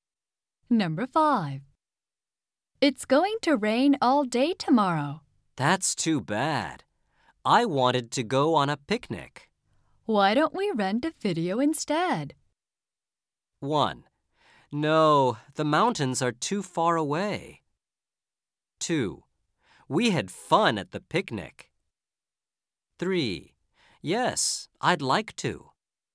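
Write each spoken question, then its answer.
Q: Why don't we rent a video instead?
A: 3: Yes, I'd like to.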